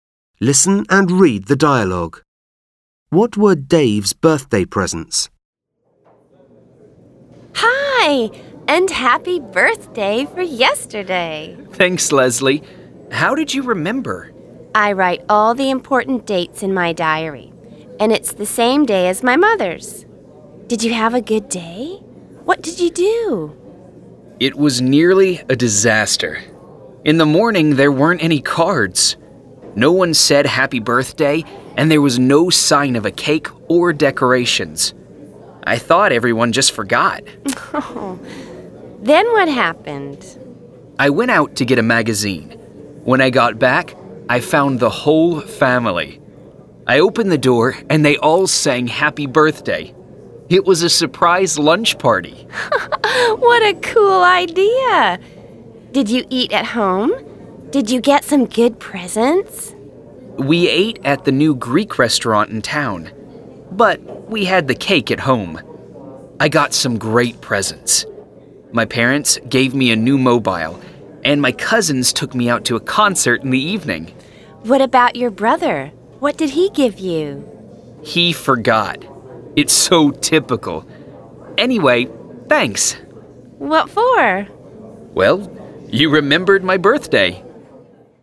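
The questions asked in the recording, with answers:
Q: What were Dave's birthday presents?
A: A new mobile from his parents and a concert trip from his cousins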